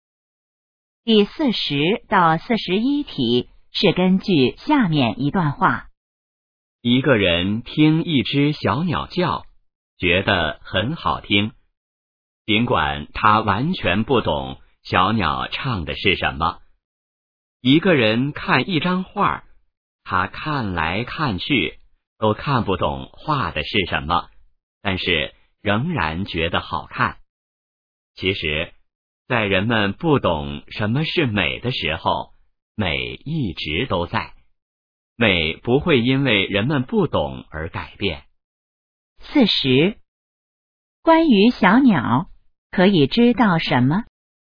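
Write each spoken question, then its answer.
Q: 四十,关于小鸟,可以知道什么?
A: 小鸟叫得很好听(虽然人听不懂它唱的是什么)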